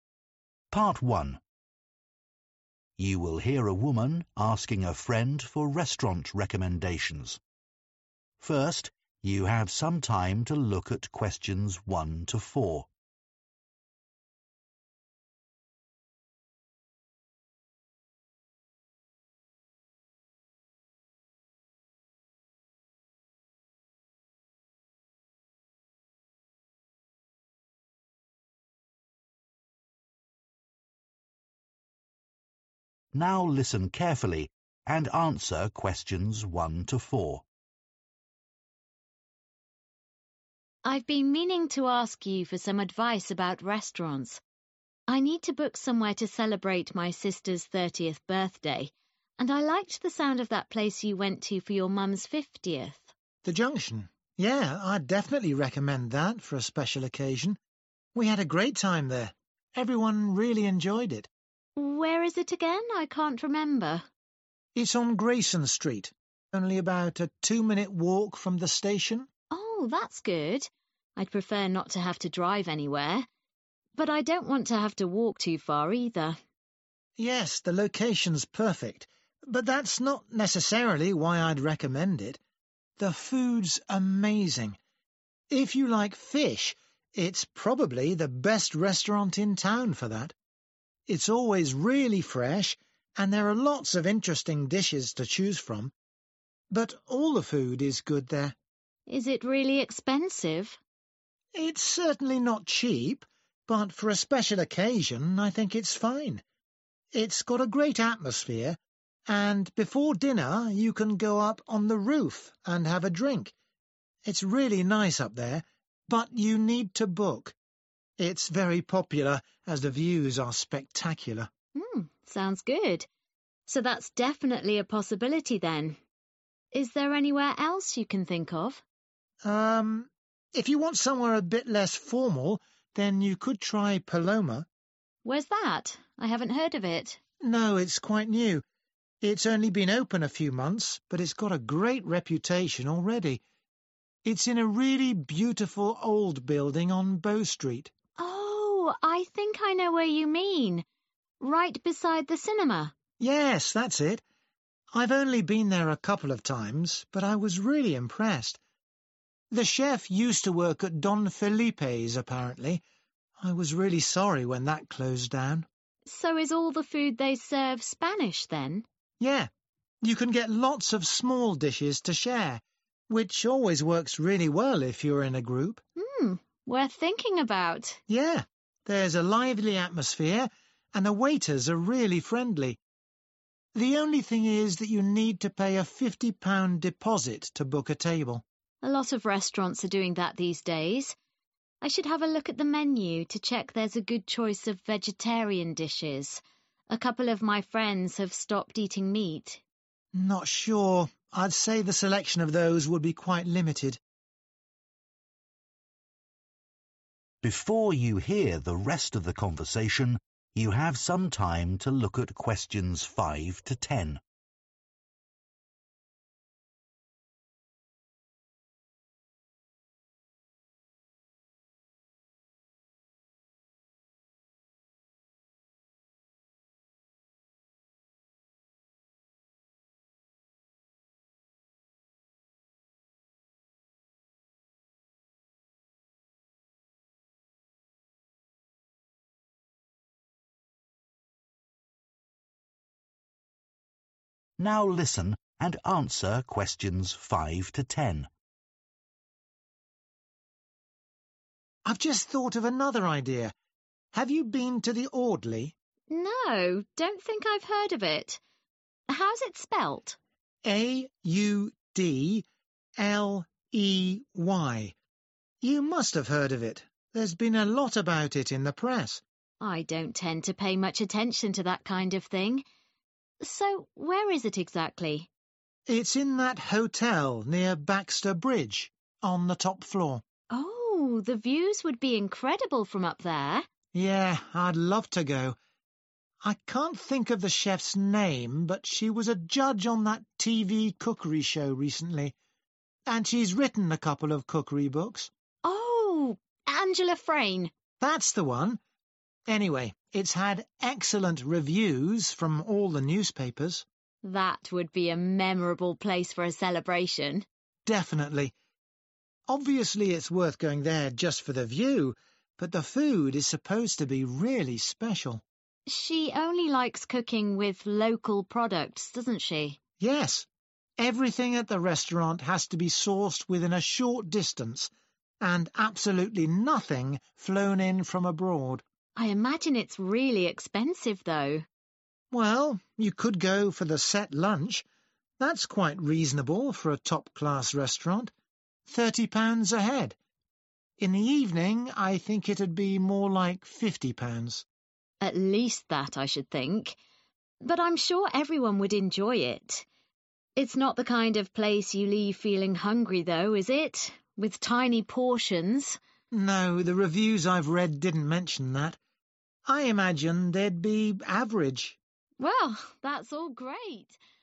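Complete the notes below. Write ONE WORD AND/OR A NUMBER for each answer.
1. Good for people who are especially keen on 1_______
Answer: fish

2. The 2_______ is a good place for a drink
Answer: roof

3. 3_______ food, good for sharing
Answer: Spanish

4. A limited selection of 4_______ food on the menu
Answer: vegetarian

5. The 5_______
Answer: Audley

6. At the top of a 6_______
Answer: hotel

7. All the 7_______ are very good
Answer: reviews

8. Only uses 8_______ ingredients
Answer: local

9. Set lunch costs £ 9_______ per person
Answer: 30

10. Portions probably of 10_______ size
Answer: average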